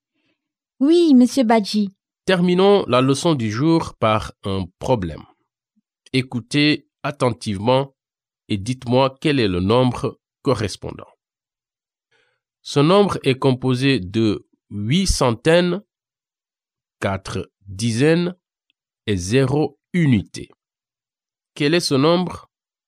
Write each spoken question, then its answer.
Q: Quel est ce nombre?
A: Je pense que c'est 840